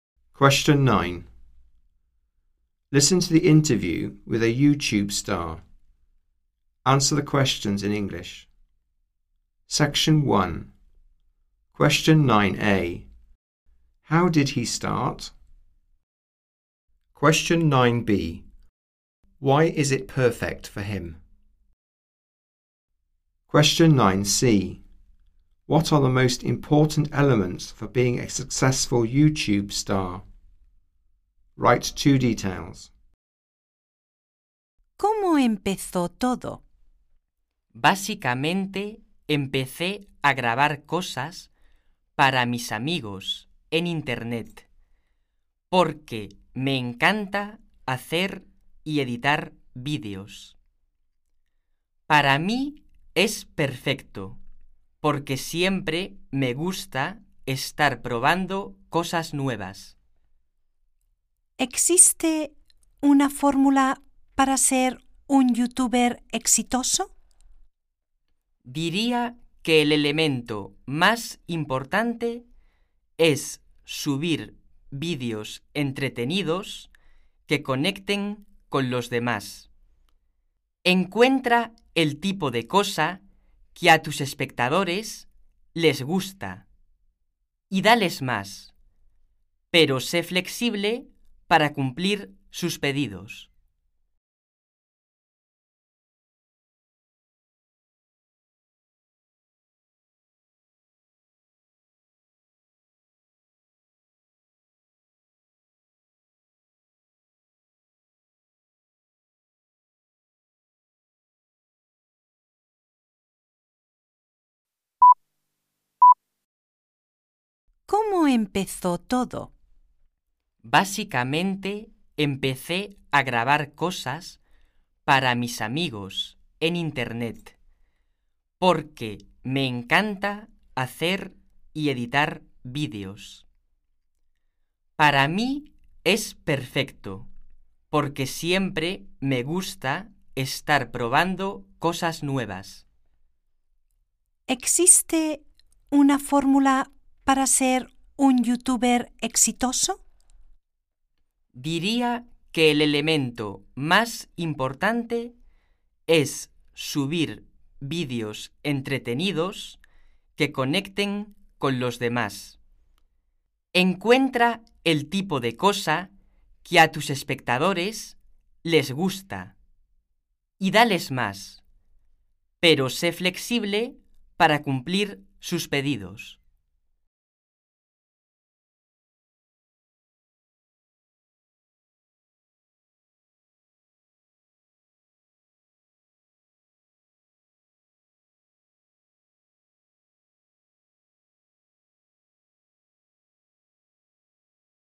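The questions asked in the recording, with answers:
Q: How did he start?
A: Recording things for his friends on the internet

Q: Why is it perfect for him?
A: He always likes trying new things

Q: What are the most important elements for being a successful YouTube star?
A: Upload entertaining videos that connect with people; give viewers more of what they like but be flexible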